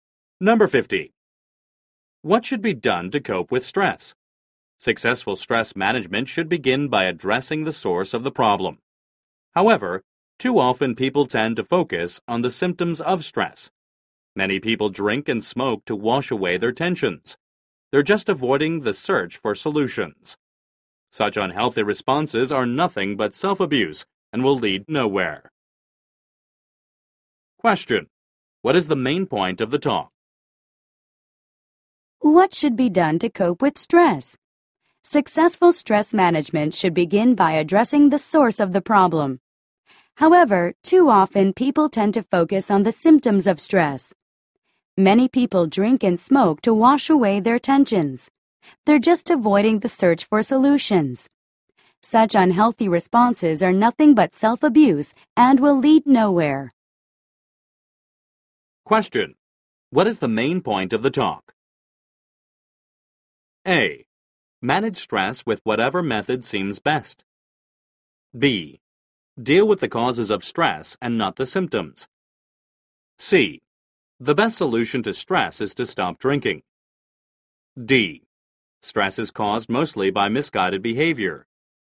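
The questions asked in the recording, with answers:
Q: What is the main point of the talk?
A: B: Deal with the causes of stress and not the symptoms.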